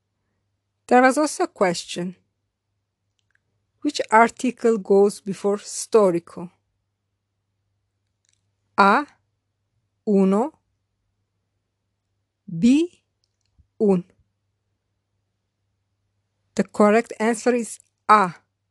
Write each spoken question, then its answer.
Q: Which article goes before storico? A. Uno. B. Un.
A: The correct answer is A. Uno.